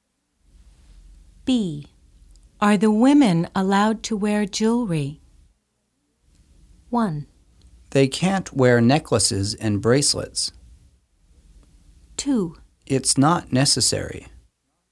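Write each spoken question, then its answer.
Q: Are the women allowed to wear jewelry?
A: 1: They can't wear necklaces and bracelets.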